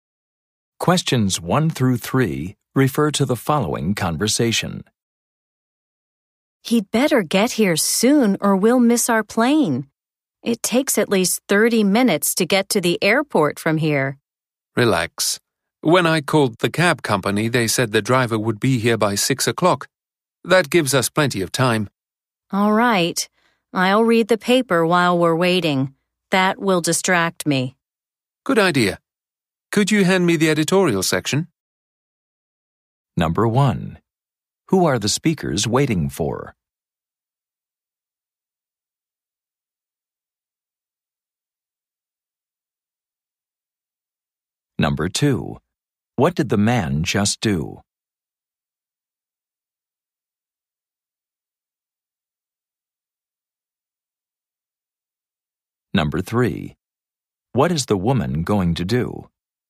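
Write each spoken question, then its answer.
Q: Who are the speakers waiting for?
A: A taxi driver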